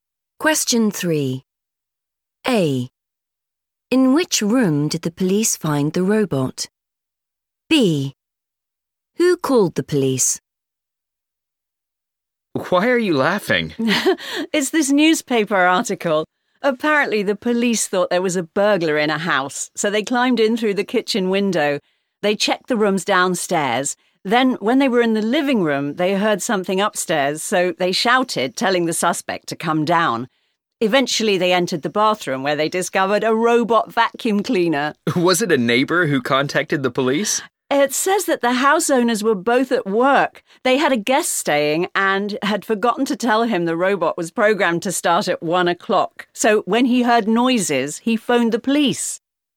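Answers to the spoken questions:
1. the bathroom
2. a guest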